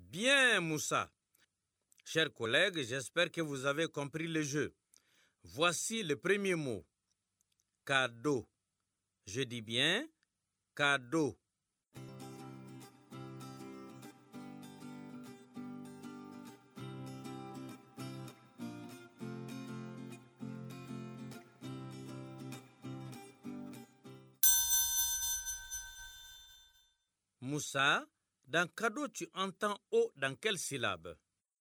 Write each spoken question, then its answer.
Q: Moussa, dans cadeau, tu entends O dans quelle syllabe?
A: Monsieur, dans Do, la deuxième syllabe.